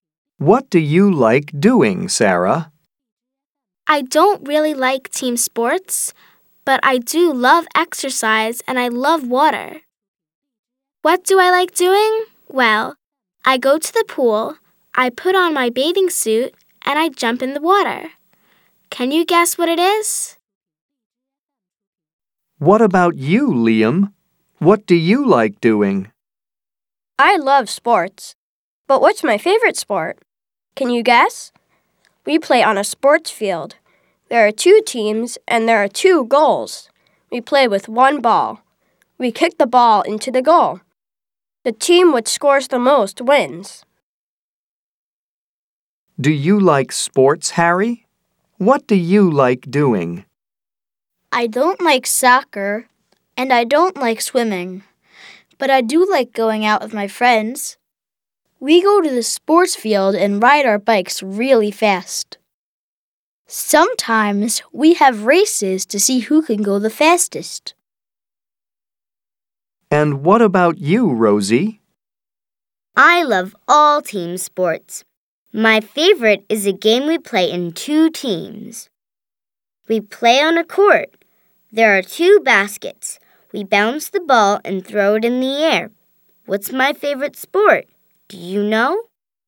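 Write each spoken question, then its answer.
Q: Can you guess what it is?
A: swimming

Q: I love sports. But what's my favorite sport?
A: soccer (football)

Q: What's my favorite sport?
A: basketball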